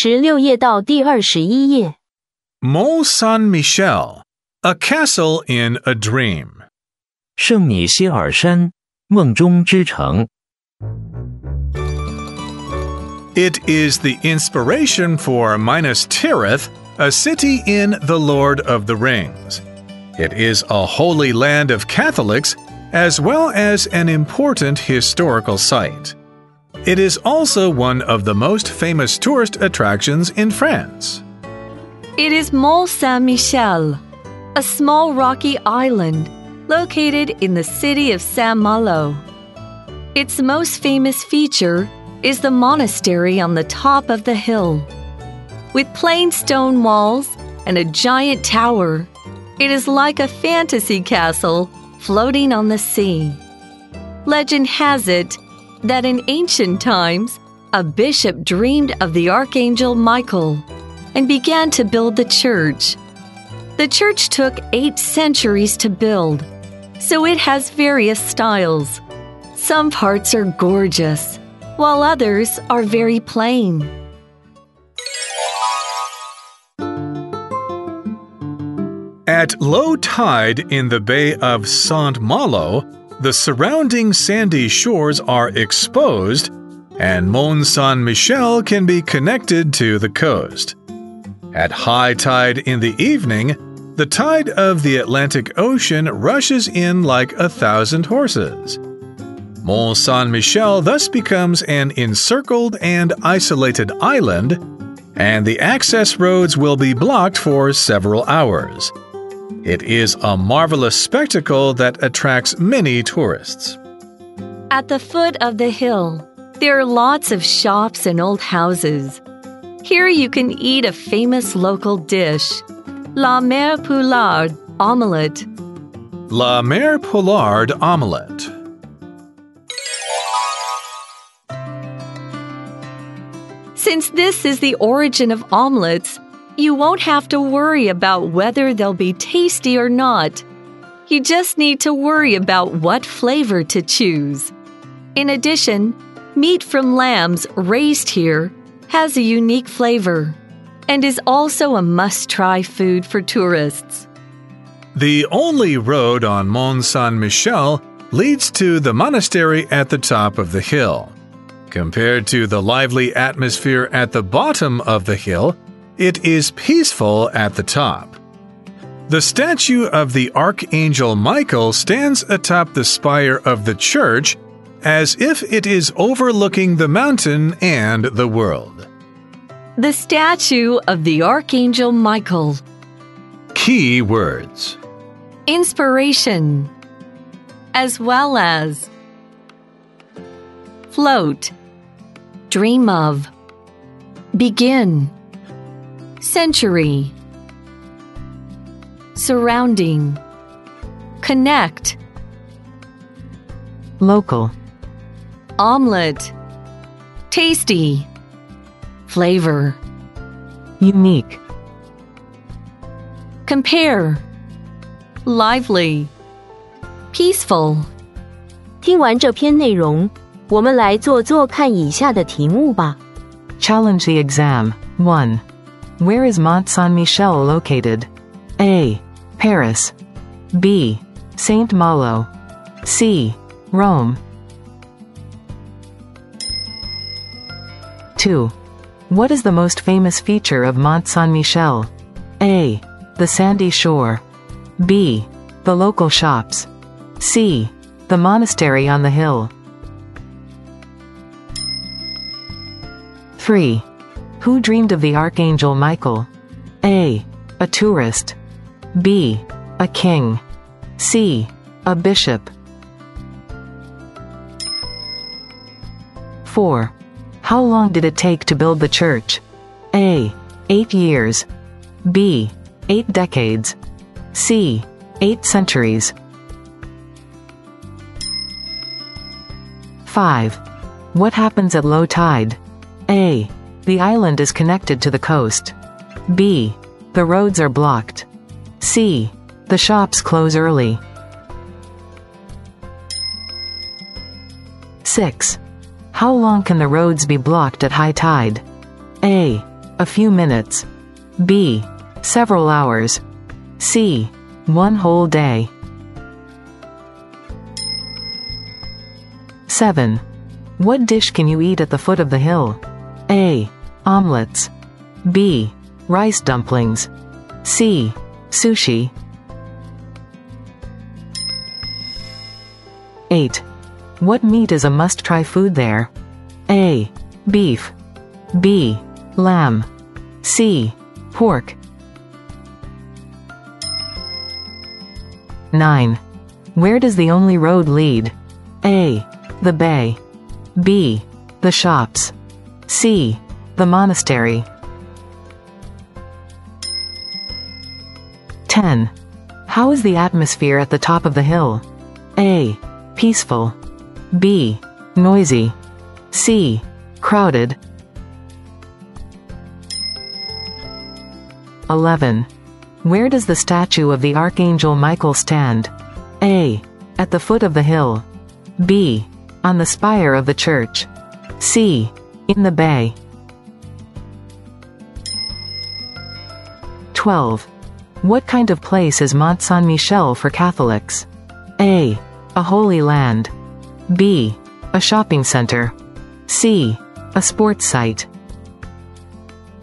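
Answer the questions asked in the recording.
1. B: Saint-Malo
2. C: The monastery on the hill
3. C: A bishop
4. C: 8 centuries
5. A: The island is connected to the coast
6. B: Several hours
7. A: Omelets
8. B: Lamb
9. C: The monastery
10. A: Peaceful
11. B: On the spire of the church
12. A: A holy land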